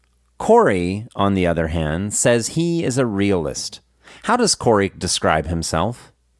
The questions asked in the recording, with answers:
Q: How does Corey describe himself?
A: Corey says he is a realist